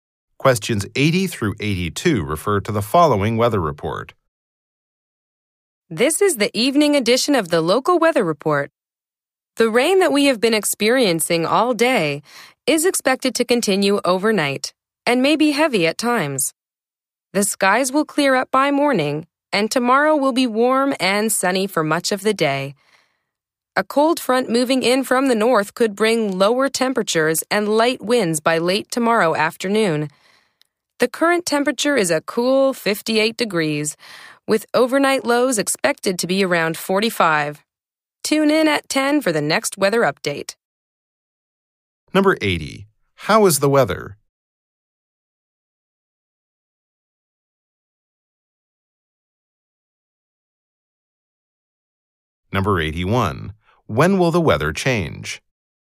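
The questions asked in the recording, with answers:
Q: How is the weather?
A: Rainy

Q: When will the weather change?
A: By morning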